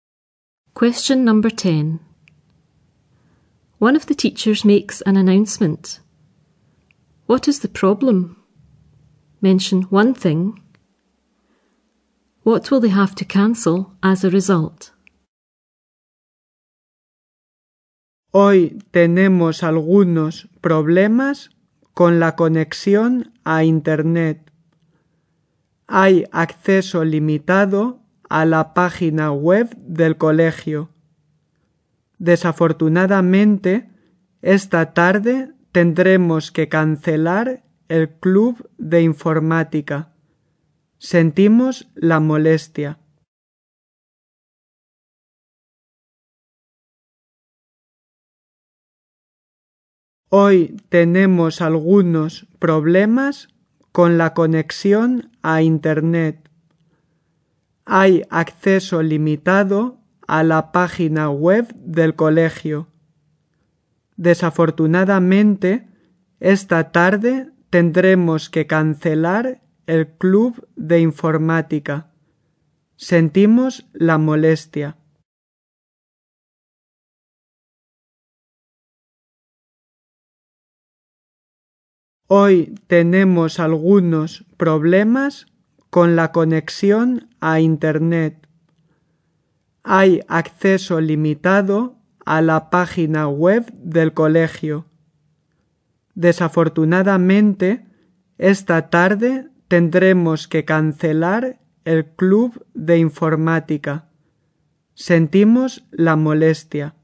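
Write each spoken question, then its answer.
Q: What is the problem?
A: Problems with the internet connection; limited access to the school website

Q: What will they have to cancel as a result?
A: The computer club this afternoon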